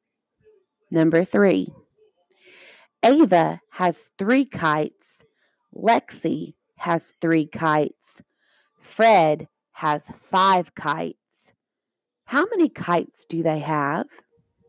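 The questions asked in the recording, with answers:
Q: How many kites do they have?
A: 11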